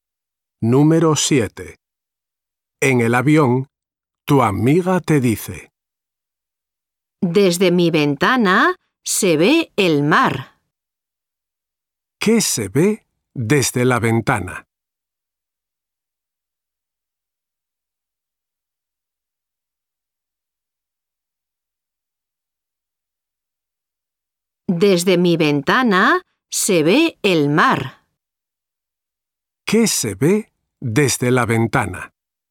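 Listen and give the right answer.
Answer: el mar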